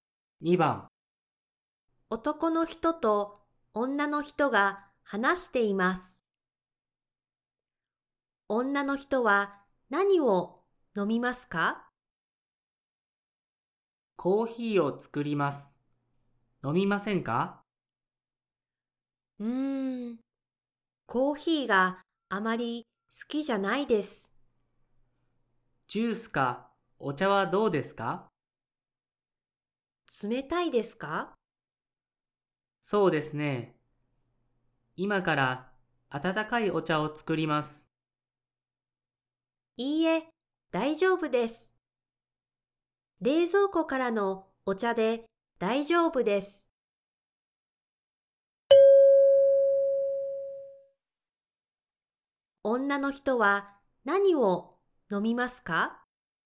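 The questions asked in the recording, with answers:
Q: 女の人は何を飲みますか?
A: 冷たいお茶(冷蔵庫のお茶)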